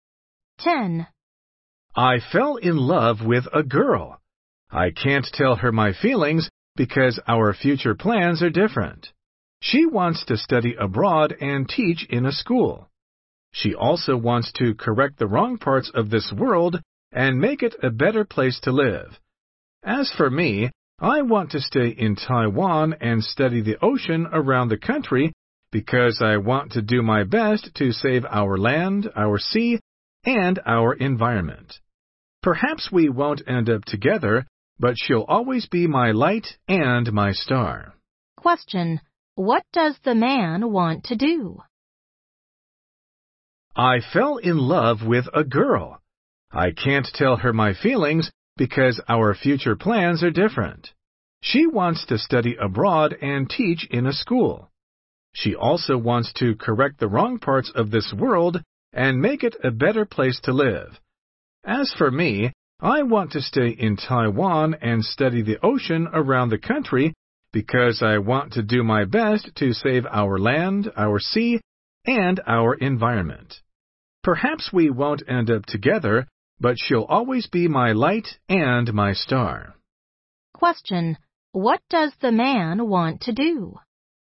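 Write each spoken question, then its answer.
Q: what does the man want to do?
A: Stay in Taiwan and study the ocean around the country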